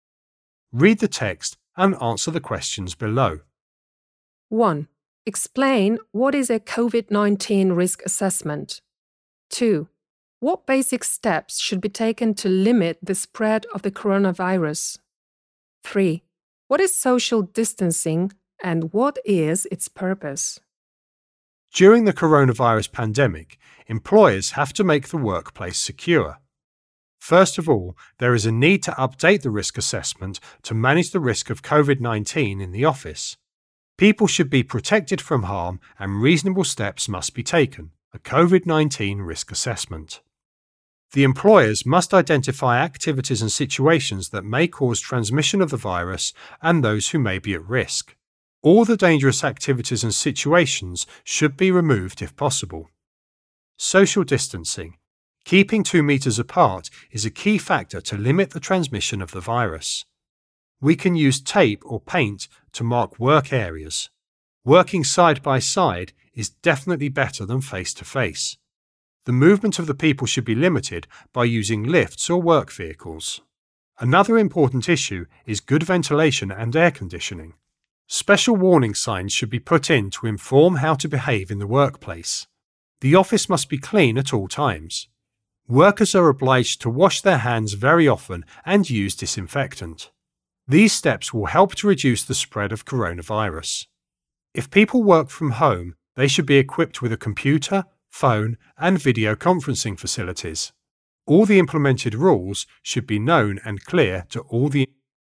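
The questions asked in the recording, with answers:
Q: Explain what is a COVID-19 risk assessment.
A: Identifying activities and situations that may cause transmission of the virus and those who may be at risk

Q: What basic steps should be taken to limit the spread of the coronavirus?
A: Social distancing, good ventilation, warning signs, keeping the office clean, frequent hand washing and disinfectant

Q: What is social distancing and what is its purpose?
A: Keeping 2 meters apart, to limit the transmission of the virus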